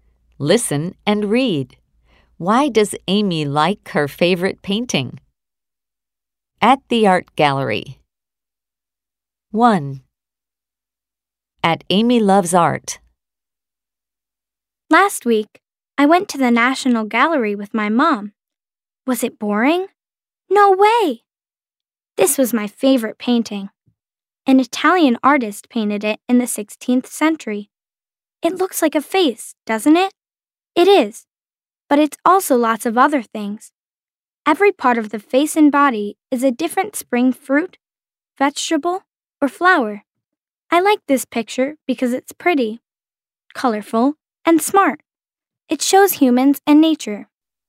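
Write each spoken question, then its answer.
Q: Why does Amy like her favorite painting?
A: Because it's pretty, colorful, and smart, and it shows humans and nature.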